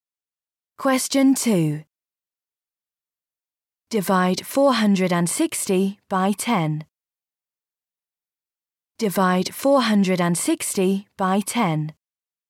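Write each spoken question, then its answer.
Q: Divide 460 by 10.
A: 46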